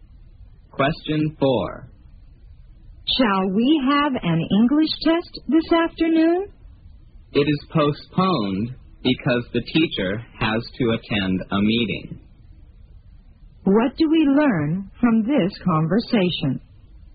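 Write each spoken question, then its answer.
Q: What do we learn from this conversation?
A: The English test is postponed because the teacher has a meeting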